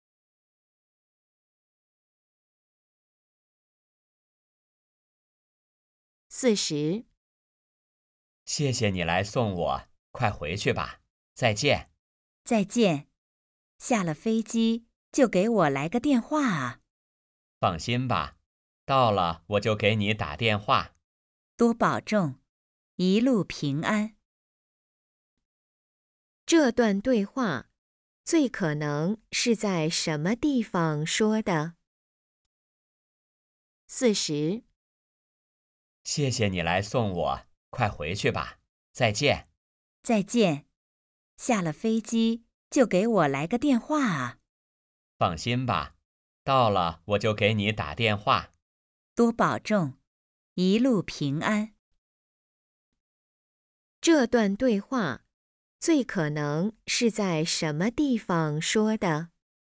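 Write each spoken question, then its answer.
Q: 这段对话最可能是在什么地方说的?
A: 机场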